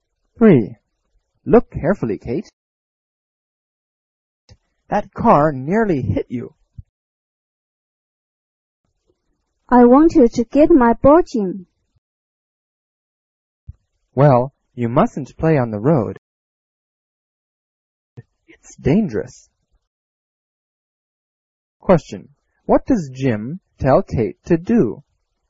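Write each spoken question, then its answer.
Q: What does Jim tell Kate to do?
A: Not to play on the road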